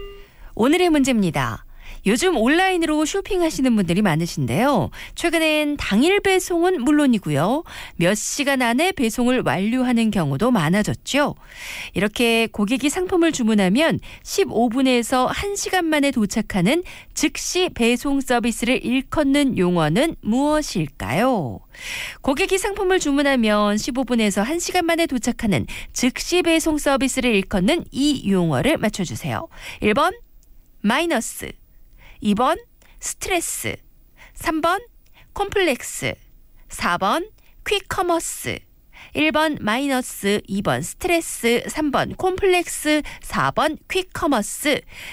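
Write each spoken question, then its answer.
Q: 이렇게 고객이 상품을 주문하면 15분에서 1시간 만에 도착하는 즉시 배송 서비스를 일컫는 용어는 무엇일까요?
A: 4: 퀵커머스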